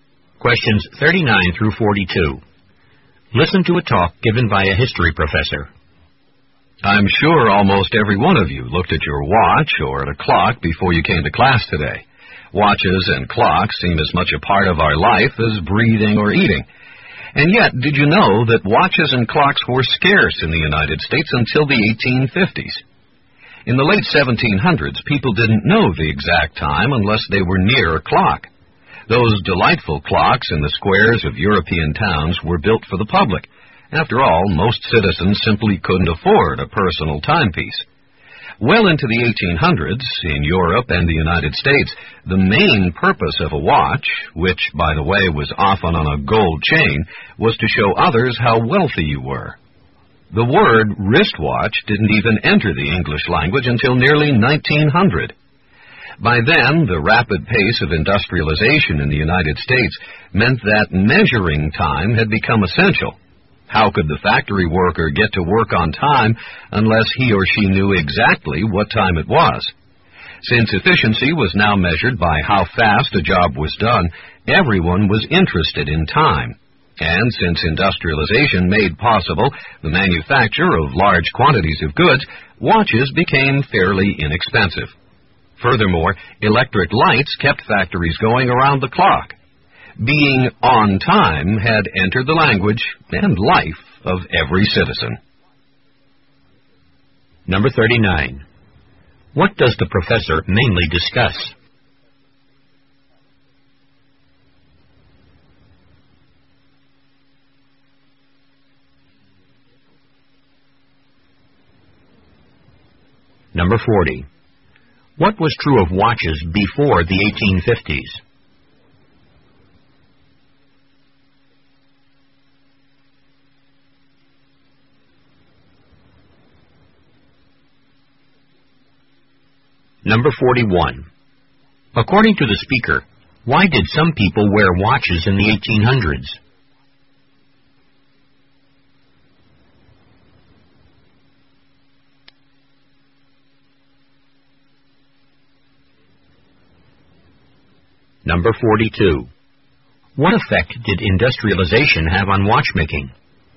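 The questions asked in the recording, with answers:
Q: What does the professor mainly discuss?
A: How watches and clocks became common in the United States

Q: What was true of watches before the 1850s?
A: They were scarce

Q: According to the speaker, why did some people wear watches in the 1800s?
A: To show others how wealthy they were

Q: What effect did industrialization have on watchmaking?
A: Watches could be made in large quantities and became fairly inexpensive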